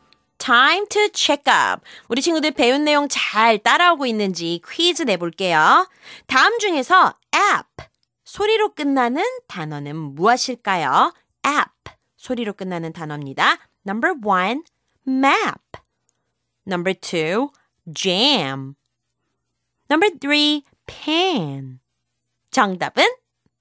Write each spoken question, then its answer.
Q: 다음 중에서 app 소리로 끝나는 단어는 무엇일까요?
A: 맞아요. Number one, map이 되겠죠.